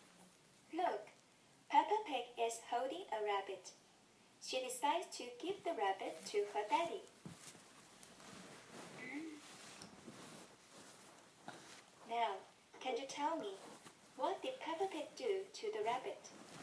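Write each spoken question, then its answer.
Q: Now, can you tell me, what did Peppa Pig do to the rabbit?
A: She gave the rabbit to her daddy.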